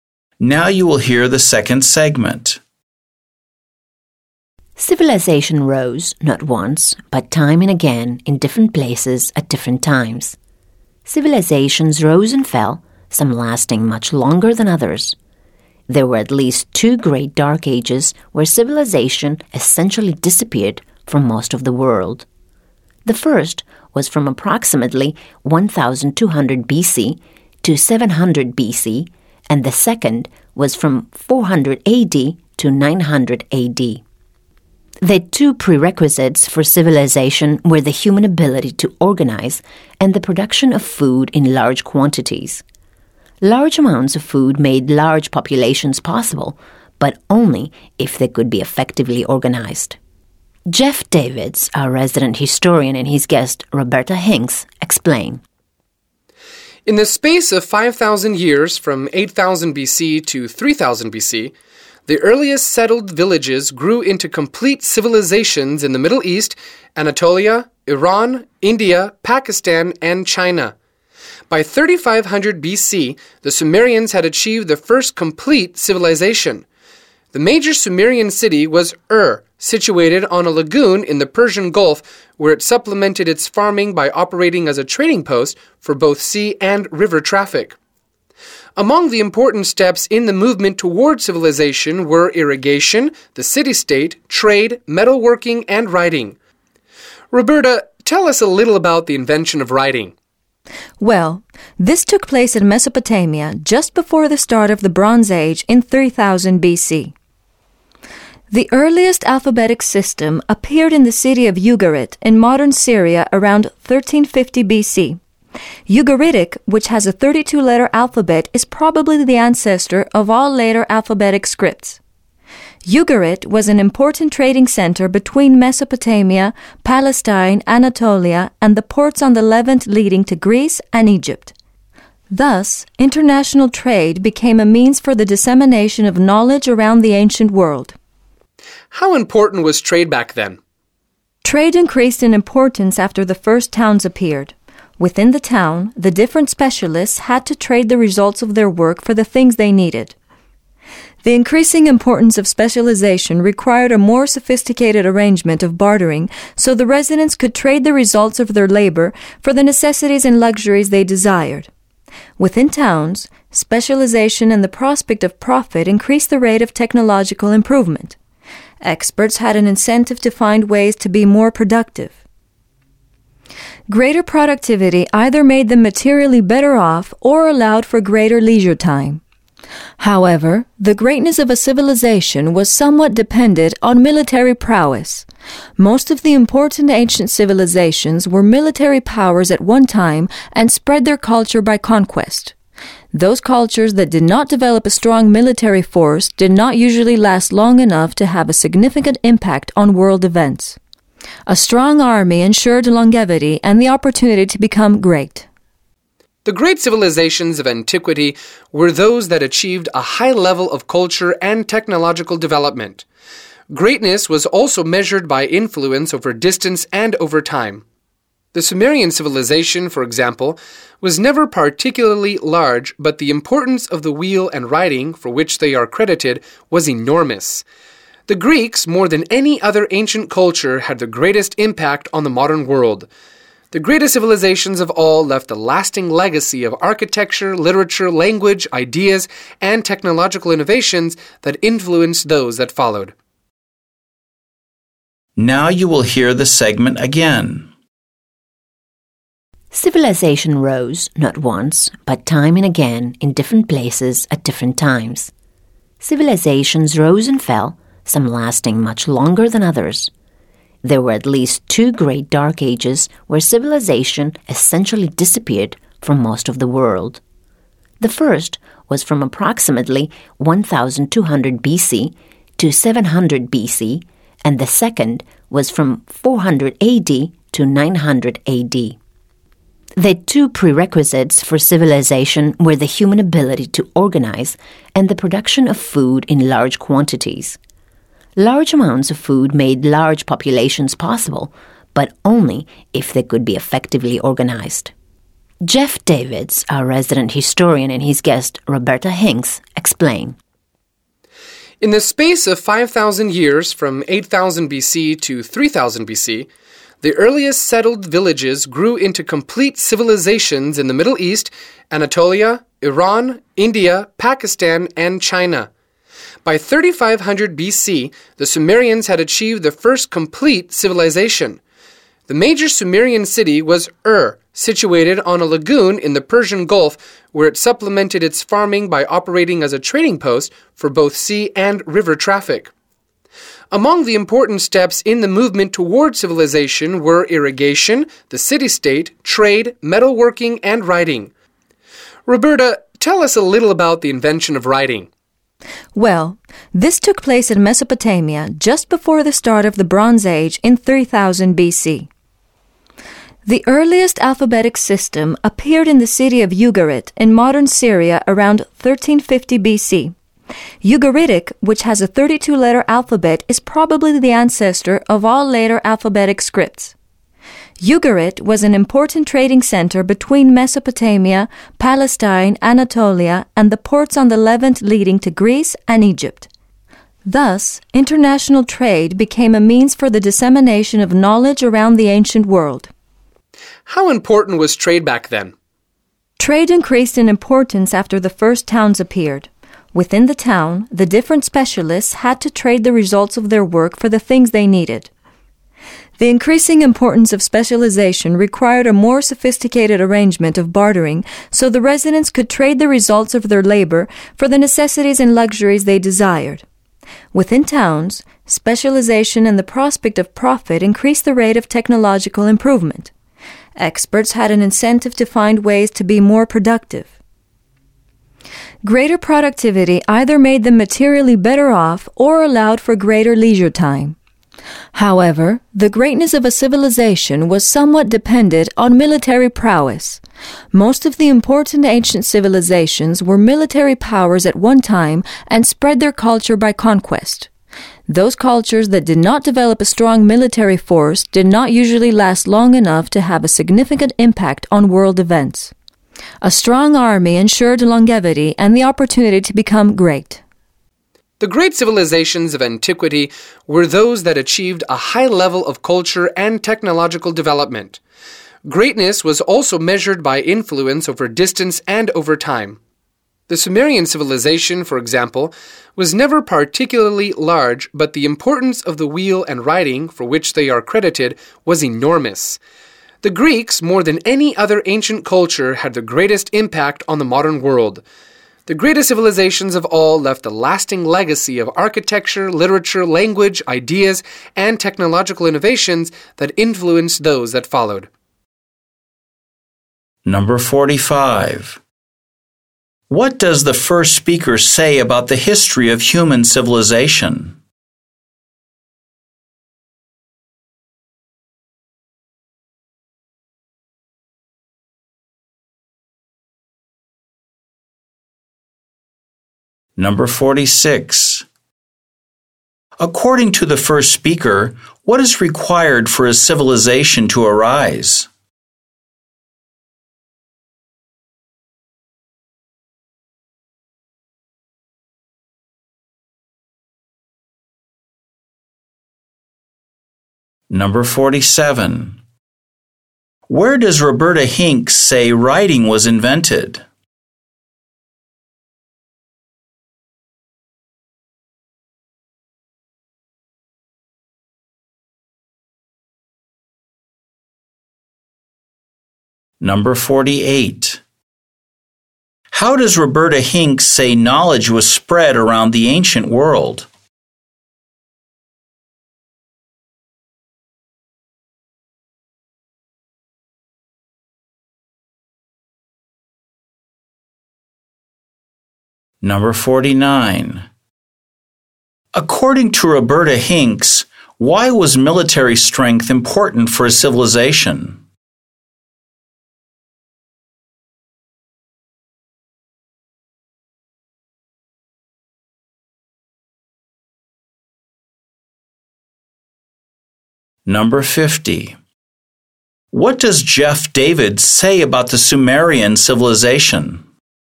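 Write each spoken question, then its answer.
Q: According to the first speaker, what is required for a civilization to arise?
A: The ability to organize and producing large amounts of food

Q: Where does Roberta Hinks say writing was invented?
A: In Mesopotamia

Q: How does Roberta Hinks say knowledge was spread around the ancient world?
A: Through international trade

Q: According to Roberta Hinks, why was military strength important for a civilization?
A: A strong army ensured it lasted long and could become great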